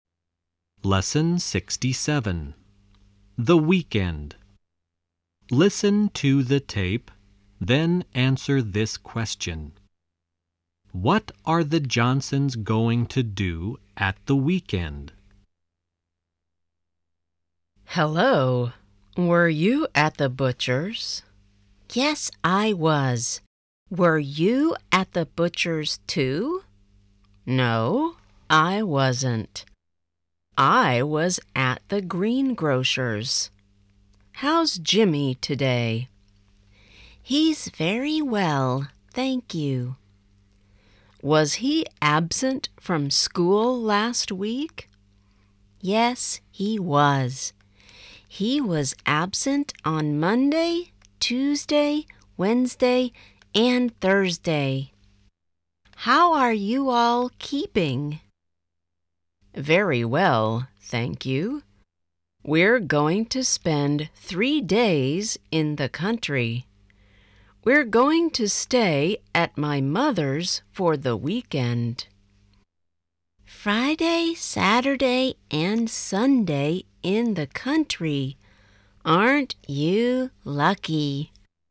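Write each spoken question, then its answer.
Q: What are the Johnsons going to do at the weekend?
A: Spend three days in the country at Mrs. Johnson's mother's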